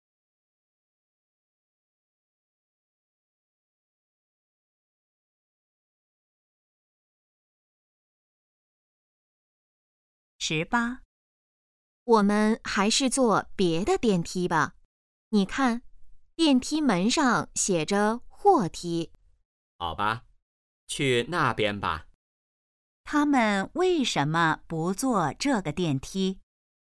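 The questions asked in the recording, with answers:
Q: 他们为什么不坐这个电梯?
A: 那是货梯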